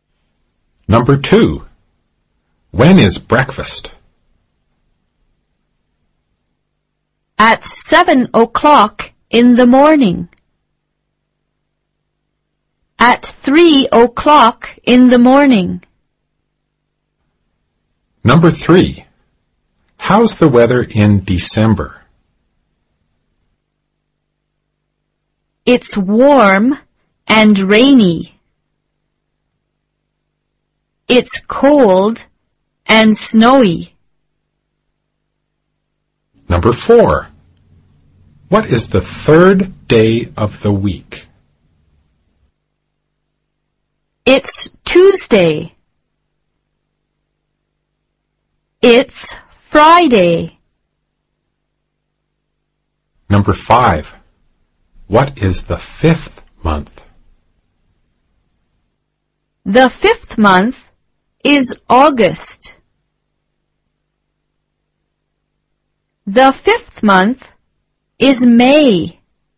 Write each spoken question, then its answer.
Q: When is breakfast?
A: Breakfast is at 7 o'clock in the morning.

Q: How's the weather in December?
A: It's cold and snowy in December.

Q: What is the third day of the week?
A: The third day of the week is Tuesday.

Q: What is the fifth month?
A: May is the fifth month.